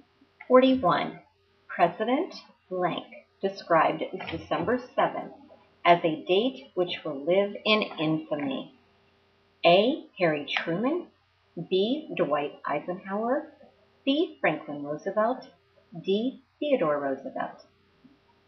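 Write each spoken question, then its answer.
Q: President Blank described December 7th as a date which will live in infamy.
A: C: Franklin Roosevelt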